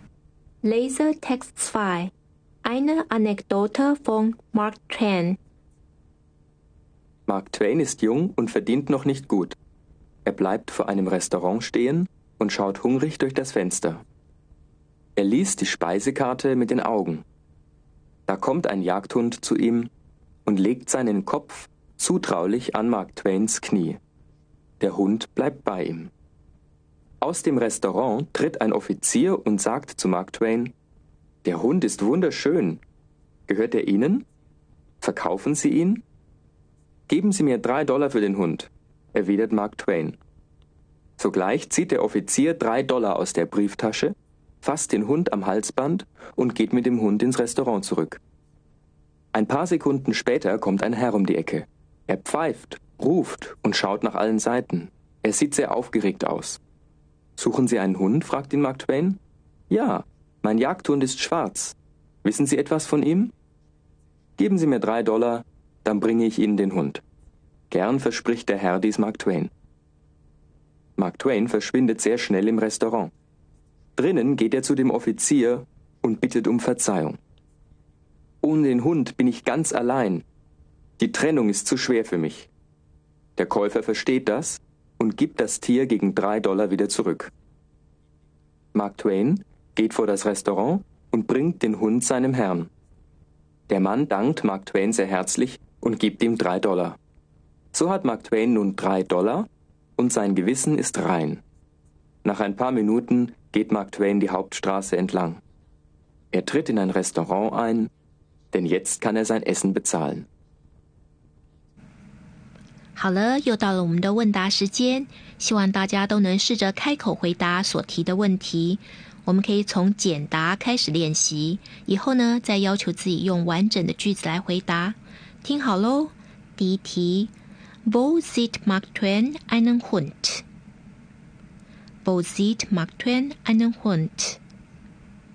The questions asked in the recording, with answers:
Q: Wo sieht Mark Twain einen Hund?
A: Ja, vor einem Restaurant sieht einen Hund.